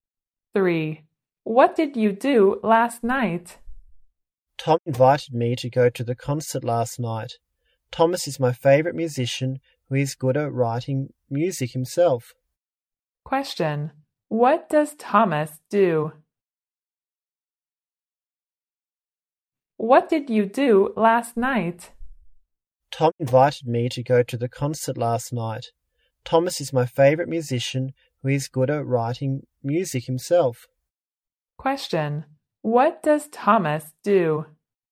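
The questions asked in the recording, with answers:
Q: What does Thomas do?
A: He is a musician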